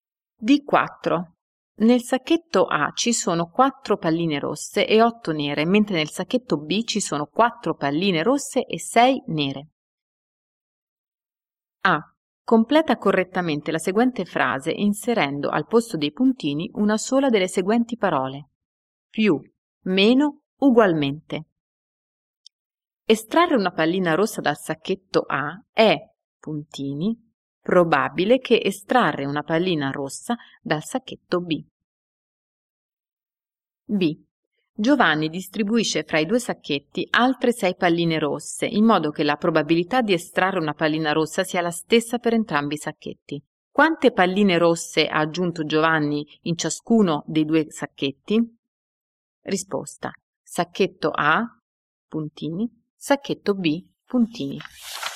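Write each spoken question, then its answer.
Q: Estrarre una pallina rossa dal sacchetto A è, puntini, probabile che estrarre una pallina rossa dal sacchetto B.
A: meno

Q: Quante palline rosse ha aggiunto Giovanni in ciascuno dei due sacchetti?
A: Sacchetto A: 4, sacchetto B: 2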